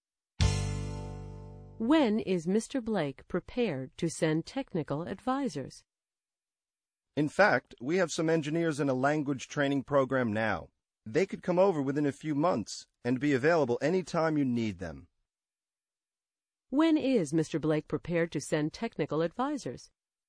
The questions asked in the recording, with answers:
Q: When is Mr. Blake prepared to send technical advisors?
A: The engineers are in a language training program now, and they'll be available within a few months.